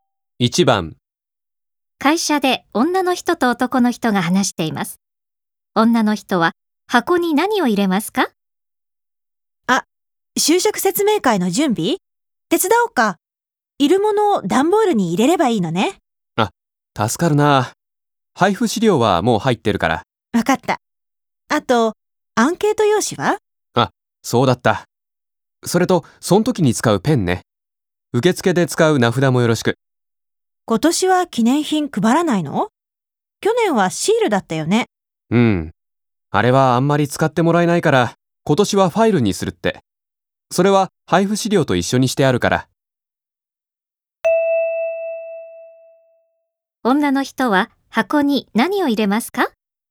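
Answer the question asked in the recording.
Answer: アンケート用紙とペンと名札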